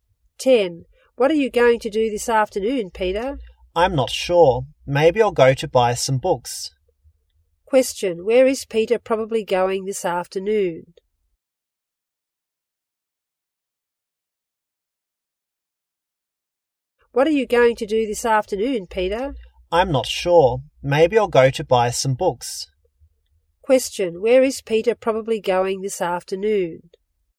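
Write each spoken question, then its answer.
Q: Question, where is Peter probably going this afternoon?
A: To a bookstore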